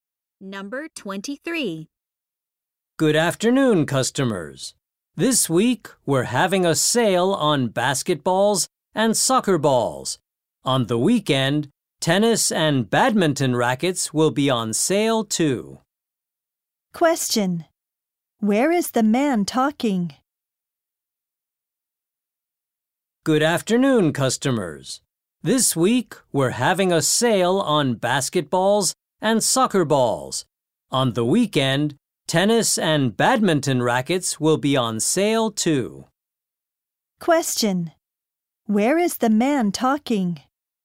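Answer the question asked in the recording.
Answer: At a sports store.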